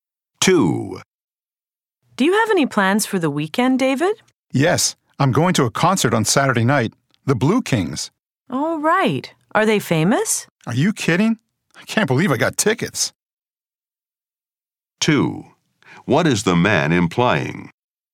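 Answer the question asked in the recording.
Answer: The Blue Kings are very famous and tickets are hard to get.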